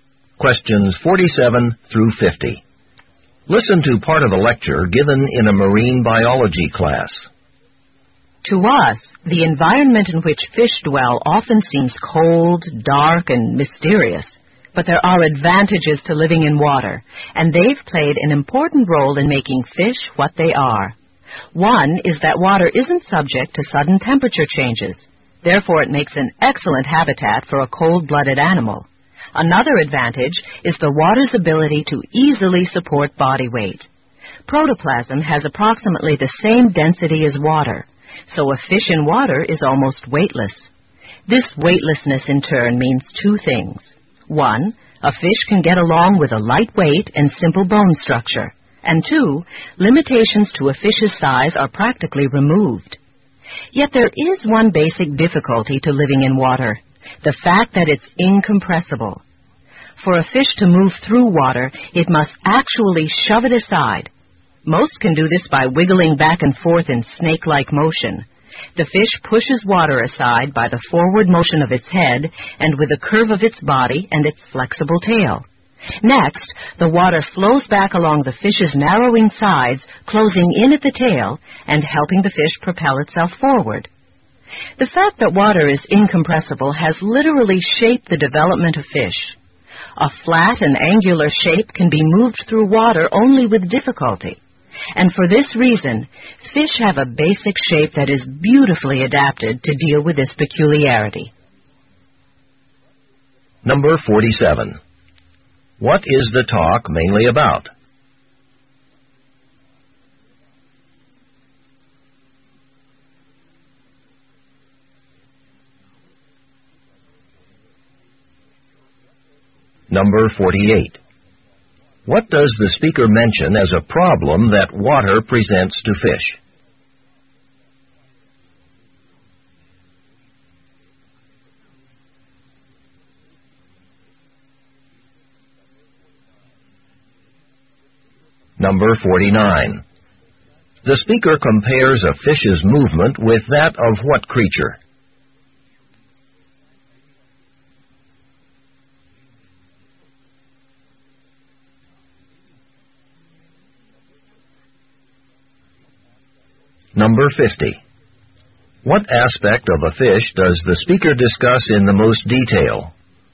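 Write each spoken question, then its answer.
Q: What does the speaker mention as a problem that water presents to fish?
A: Water is incompressible

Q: The speaker compares a fish's movement with that of what creature?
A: A snake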